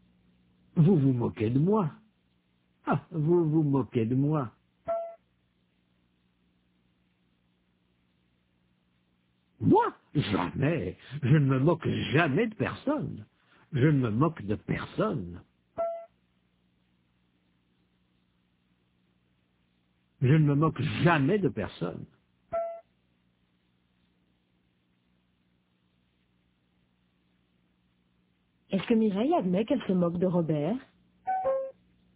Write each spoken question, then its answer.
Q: Est-ce que Mireille admet qu'elle se moque de Robert?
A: Non. Elle ne se moque jamais de personne.